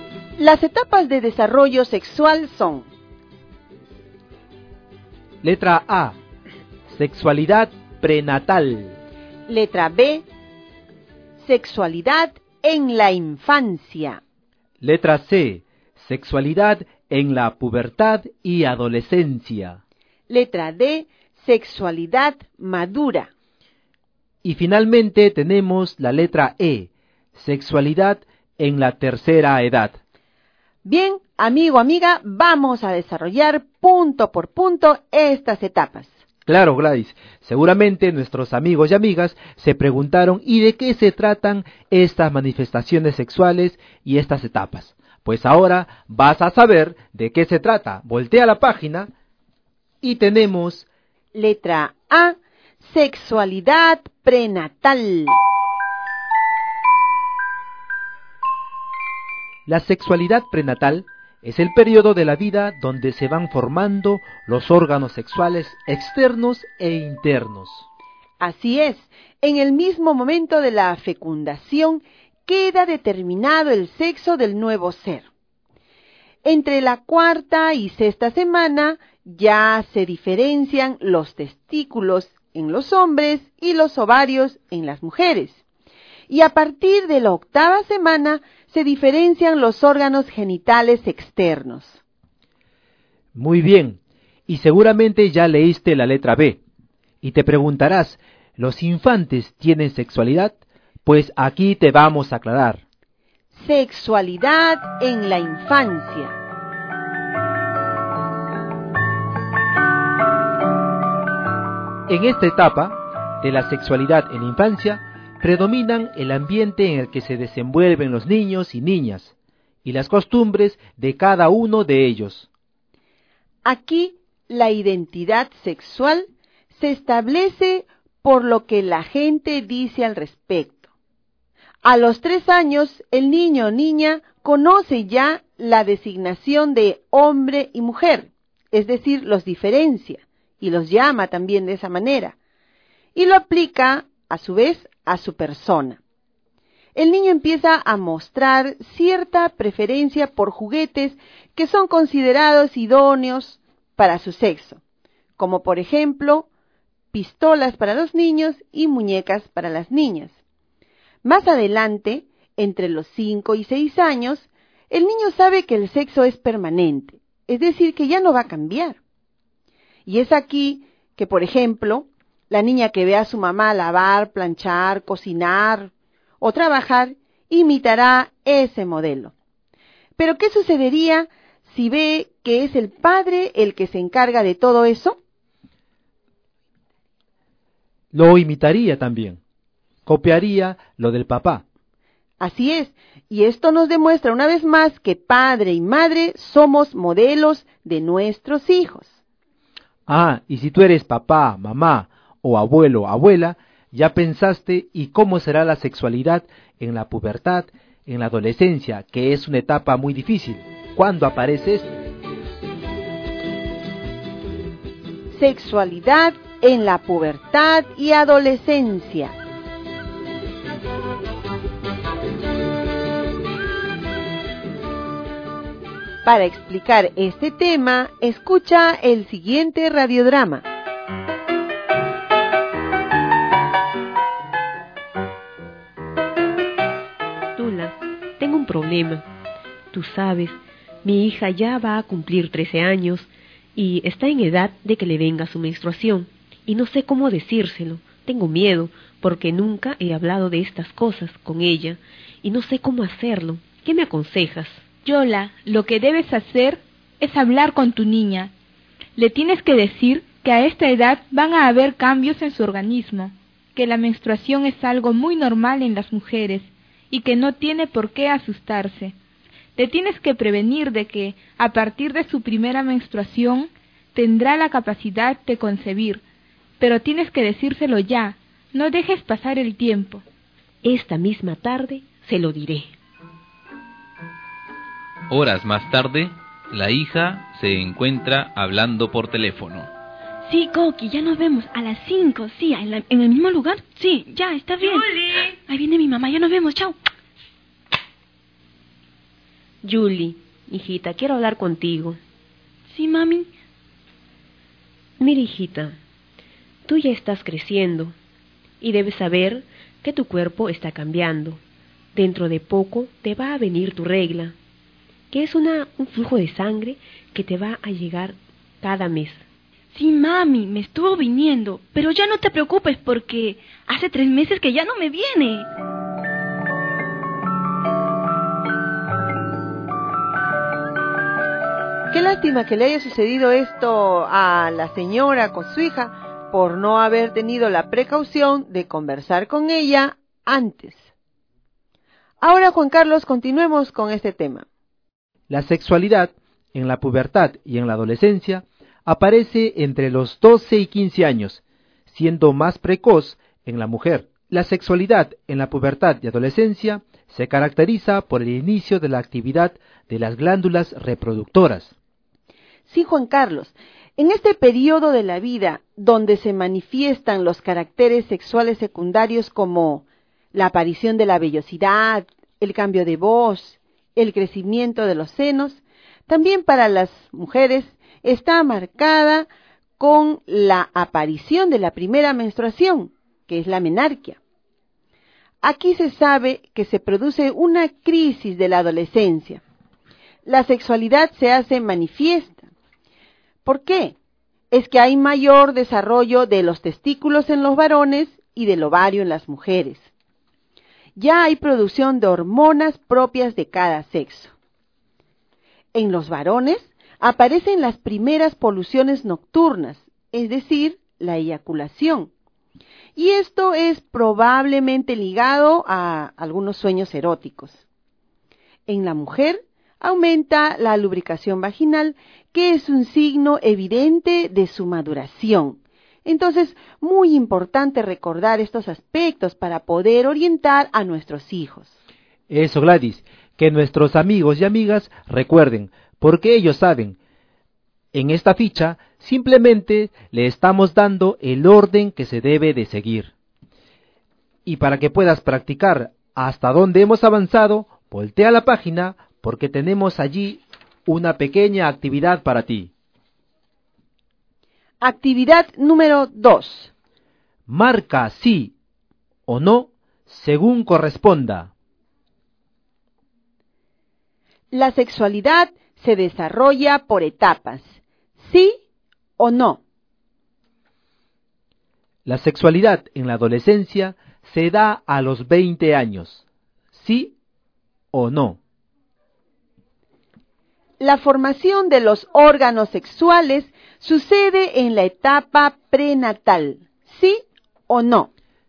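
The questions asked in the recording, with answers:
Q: La sexualidad se desarrolla por etapas.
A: Sí

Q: La sexualidad en la adolescencia se da a los 20 años.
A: No

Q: La formación de los órganos sexuales sucede en la etapa prenatal.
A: Sí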